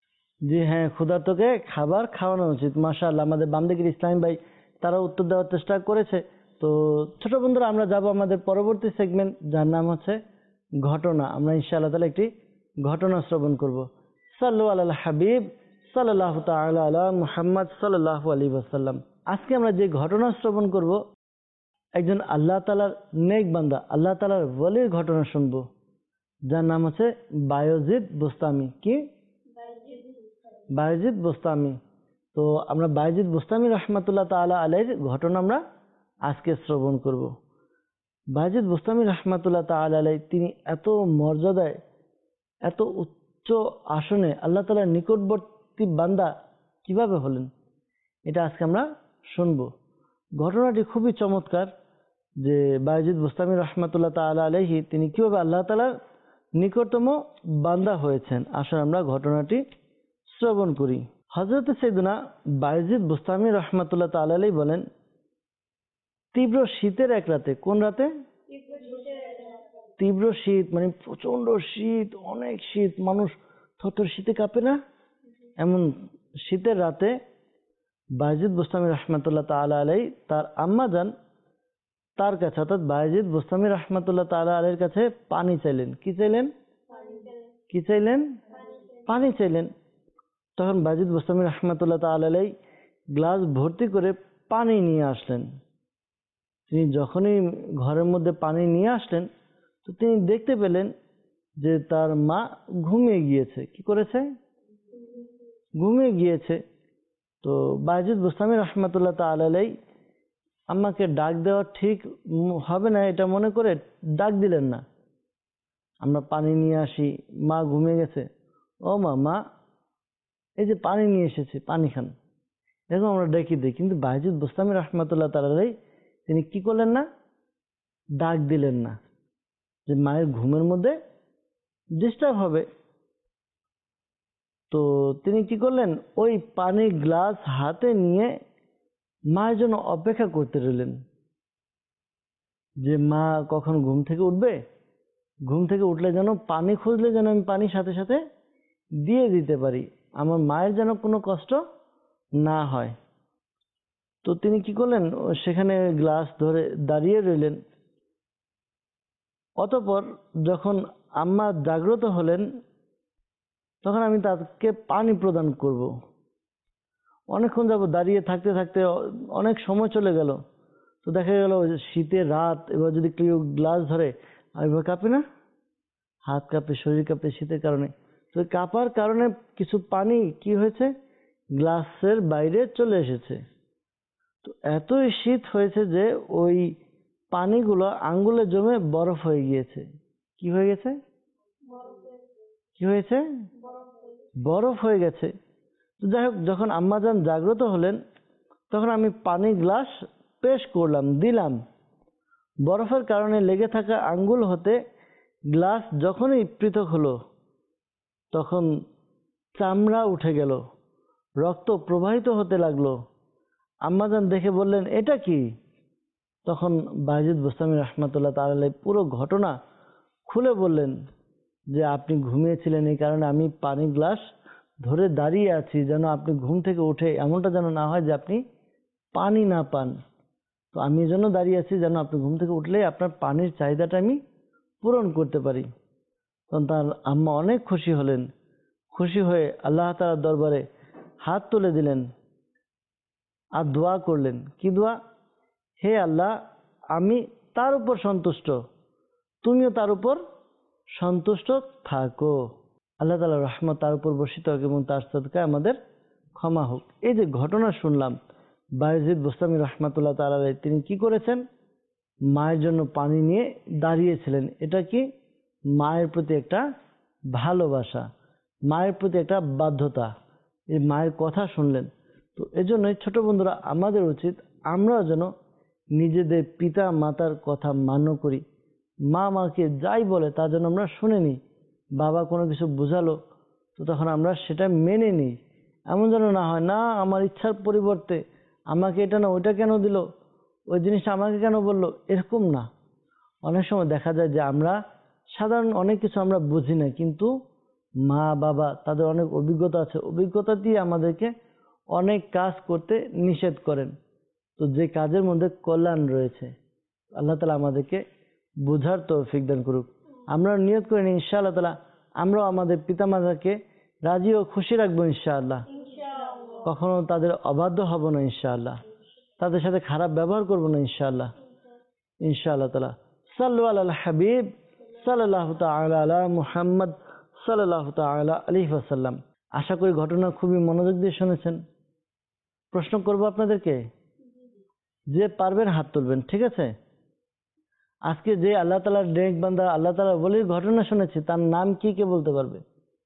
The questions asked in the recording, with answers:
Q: আজকে যে আল্লাহ তাআলার ডেক বান্দা আল্লাহ তাআলার বলির ঘটনা শুনেছে তার নাম কি, কে বলতে পারবে?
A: বায়েজিদ Bustami রাহমাতুল্লাহ তাআলা আলাইহি, মাশাআল্লাহ আপনার উত্তর সঠিক হয়েছে।